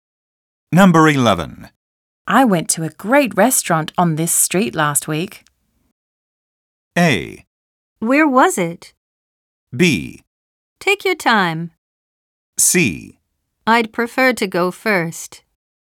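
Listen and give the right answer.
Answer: A: Where was it?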